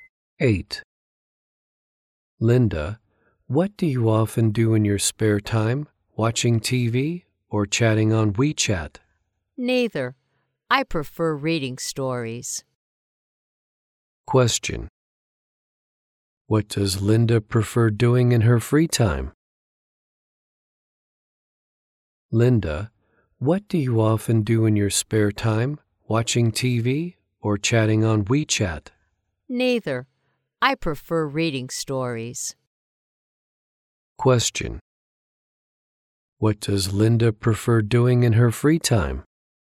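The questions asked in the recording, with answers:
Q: What does Linda prefer doing in her free time?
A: Reading stories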